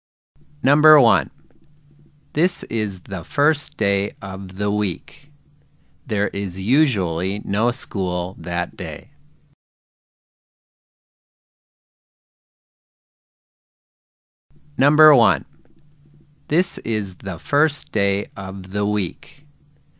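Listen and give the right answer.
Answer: Sunday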